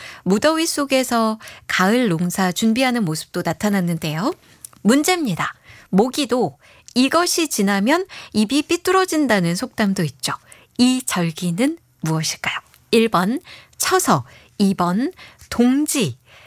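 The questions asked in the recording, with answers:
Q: 이 절기는 무엇일까요? 1번 처서, 2번 동지.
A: 1: 처서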